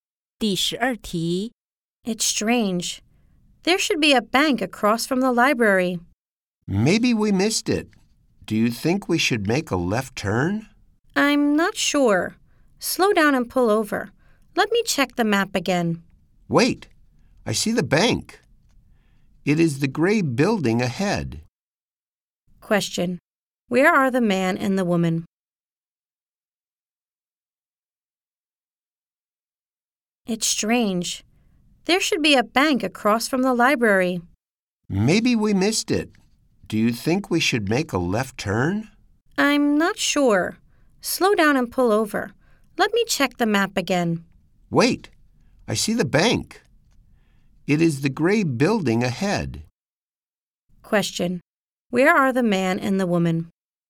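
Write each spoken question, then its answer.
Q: Where are the man and the woman?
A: In a car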